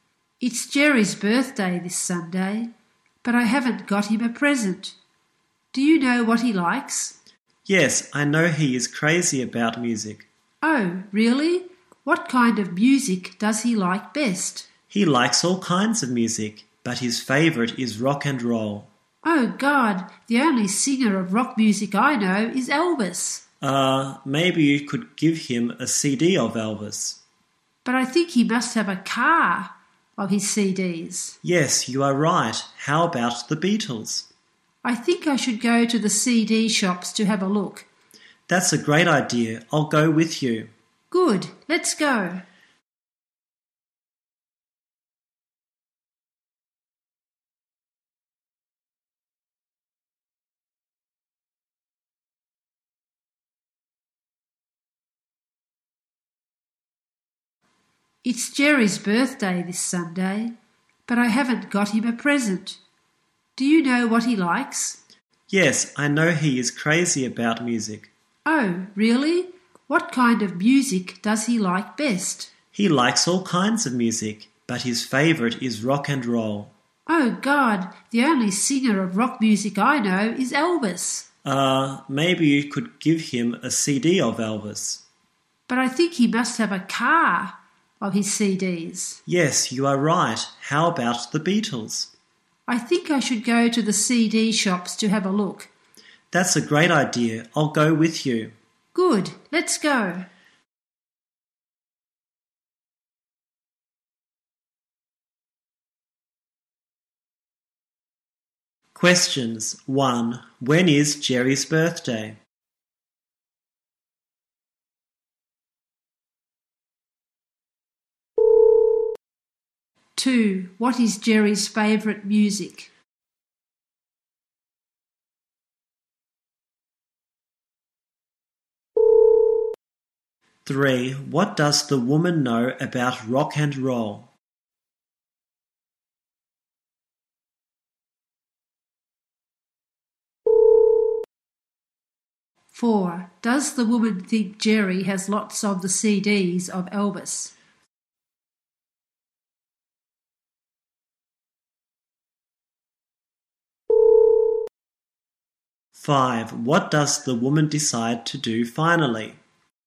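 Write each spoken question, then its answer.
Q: When is Jerry's birthday?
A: This Sunday

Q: What is Jerry's favourite music?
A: Rock and roll

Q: What does the woman decide to do finally?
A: Go to the CD shops to have a look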